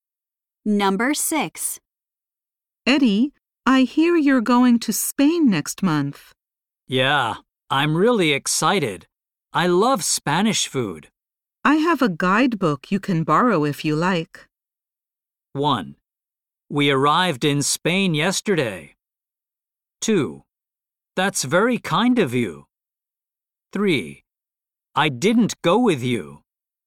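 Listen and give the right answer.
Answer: 2: That's very kind of you.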